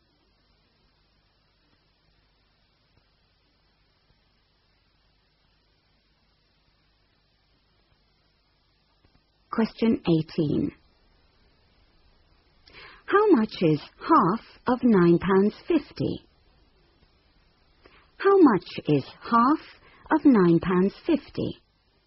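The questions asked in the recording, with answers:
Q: How much is half of £9.50?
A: £4.75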